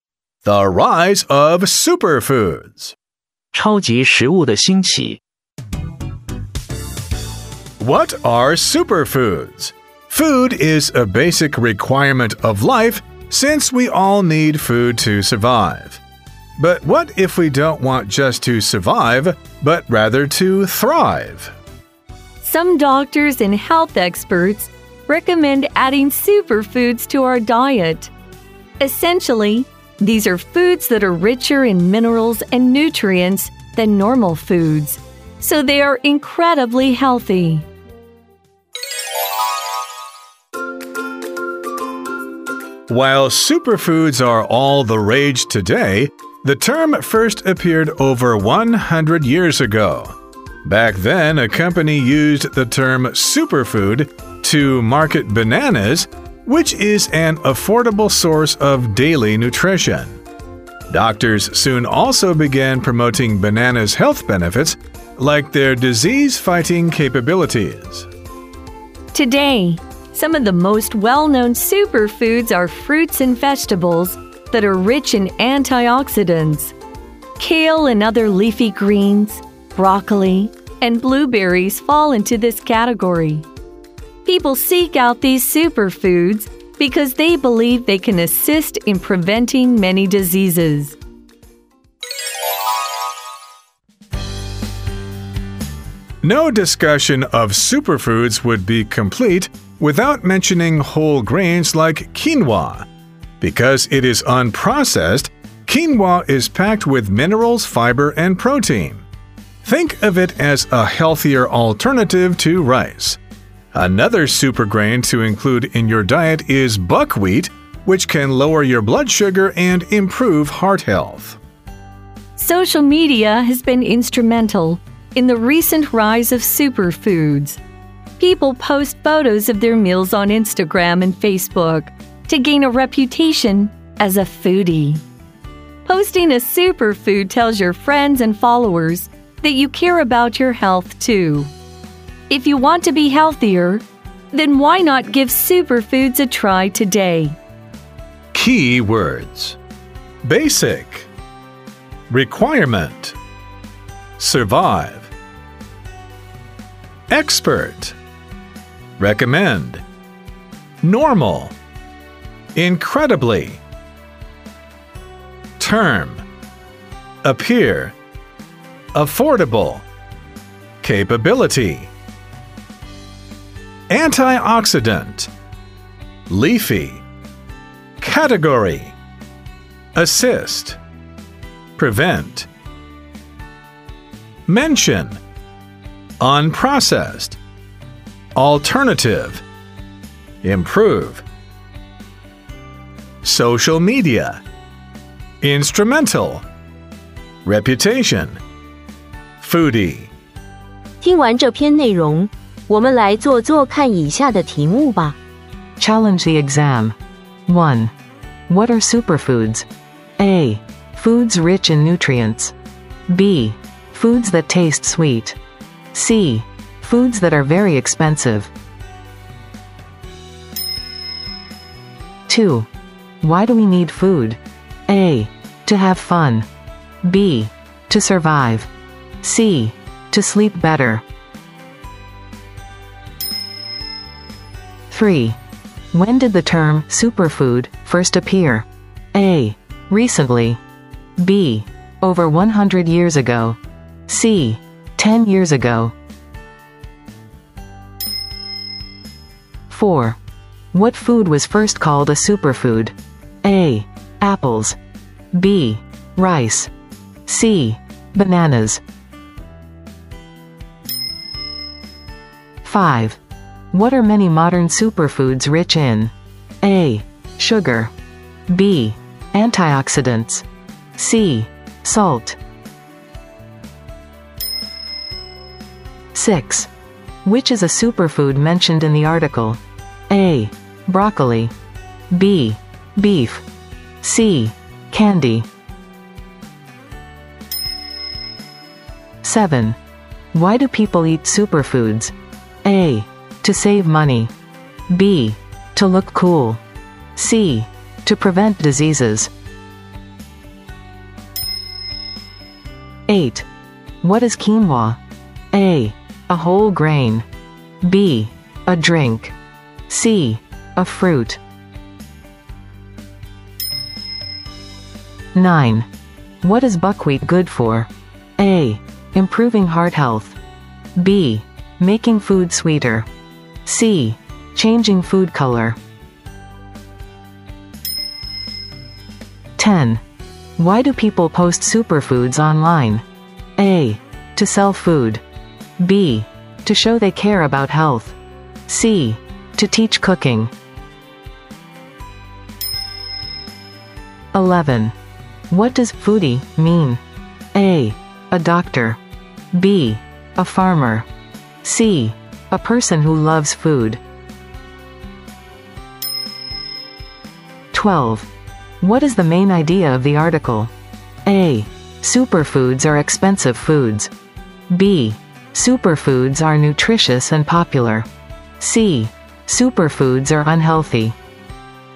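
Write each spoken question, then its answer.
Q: What are superfoods?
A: A: Foods rich in nutrients.

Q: Why do we need food?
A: B: To survive.

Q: When did the term superfood first appear?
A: B: Over 100 years ago.

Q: What food was first called a superfood?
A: C: Bananas.

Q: What are many modern superfoods rich in?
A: B: Antioxidants.

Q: Which is a superfood mentioned in the article?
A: A: Broccoli.

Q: Why do people eat superfoods?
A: C: To prevent diseases.

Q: What is quinoa?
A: A: A whole grain.

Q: What is buckwheat good for?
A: A: Improving heart health.

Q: Why do people post superfoods online?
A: B: To show they care about health.

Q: What does foodie mean?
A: C: A person who loves food.

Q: What is the main idea of the article?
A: B: Superfoods are nutritious and popular.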